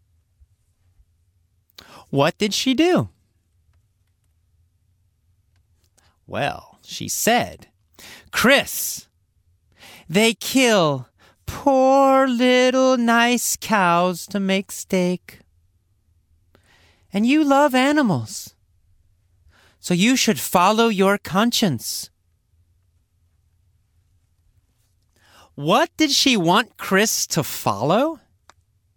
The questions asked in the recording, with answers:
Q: What did she want Chris to follow?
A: His conscience.